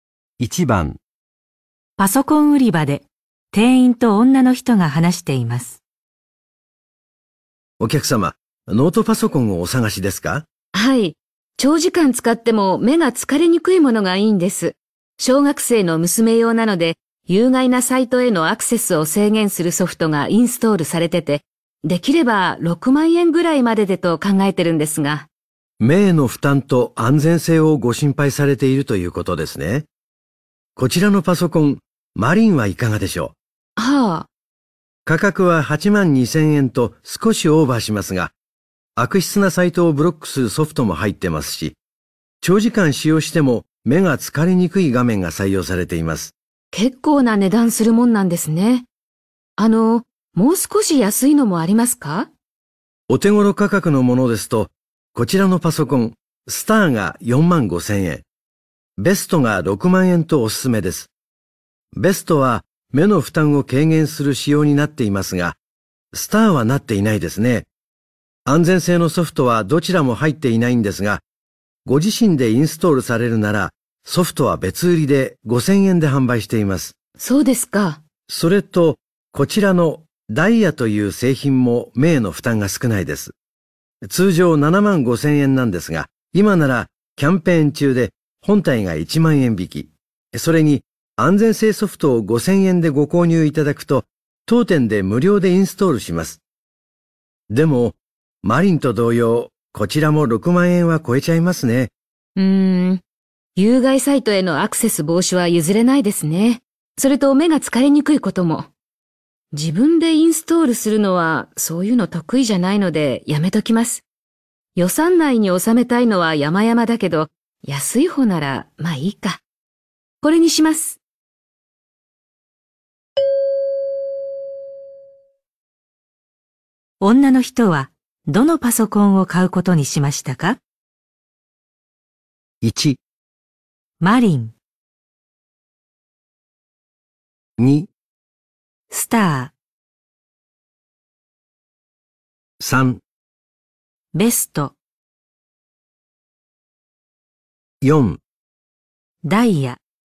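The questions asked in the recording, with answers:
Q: 女の人はどのパソコンを買うことにしましたか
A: 4: ダイヤ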